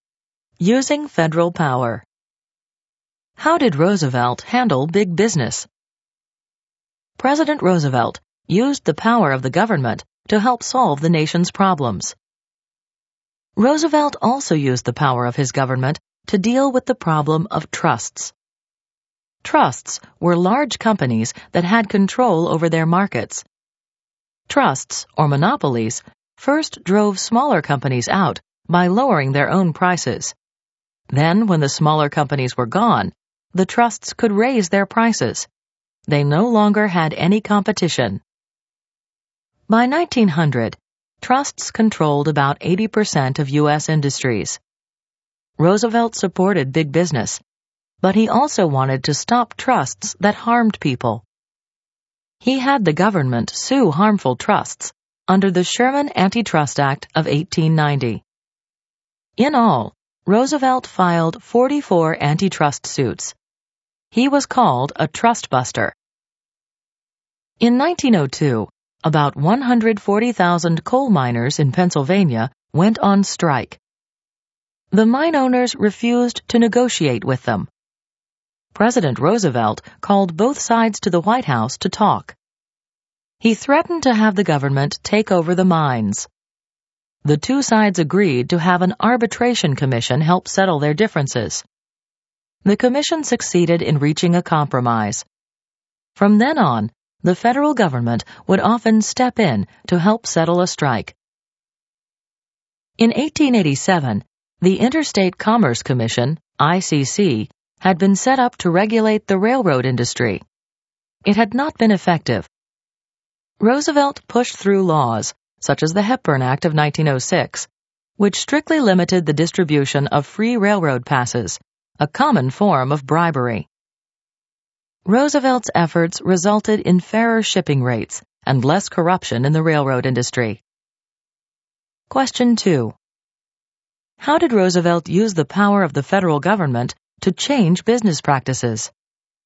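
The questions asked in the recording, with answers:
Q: How did Roosevelt use the power of the federal government to change business practices?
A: He filed antitrust suits against harmful trusts, helped settle the coal strike through arbitration, and pushed laws like the Hepburn Act to regulate railroads.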